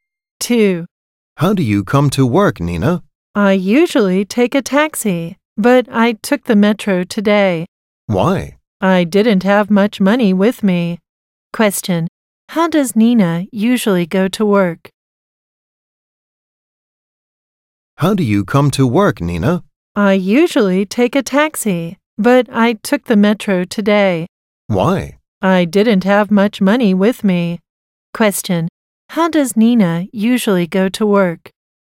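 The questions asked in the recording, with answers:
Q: Question, how does Nina usually go to work?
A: By taxi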